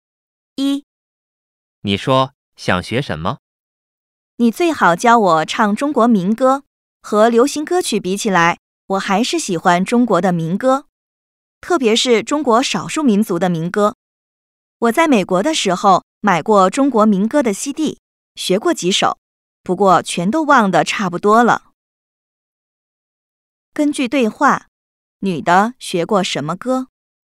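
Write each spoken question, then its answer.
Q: 根据对话,女的学过什么歌?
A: 中国民歌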